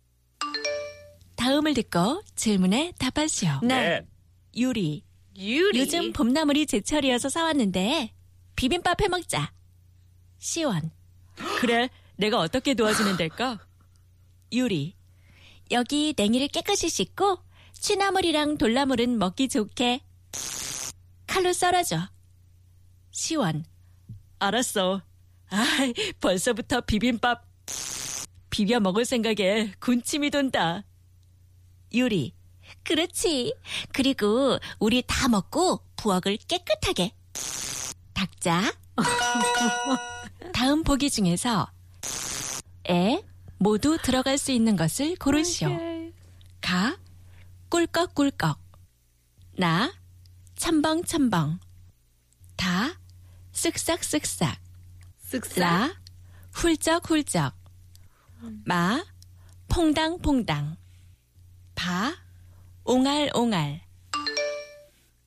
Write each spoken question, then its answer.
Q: 다음 보기 중에서 에 모두 들어갈 수 있는 것을 고르시오.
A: Ta, sik-sak, sik-sak.